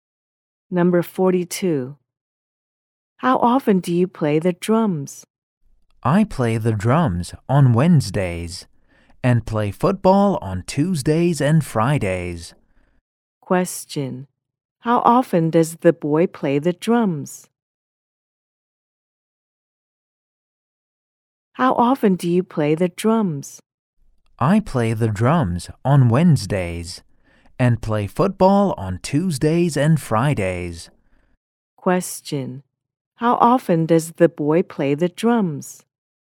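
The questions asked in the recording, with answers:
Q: How often does the boy play the drums?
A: Once a week, on Wednesdays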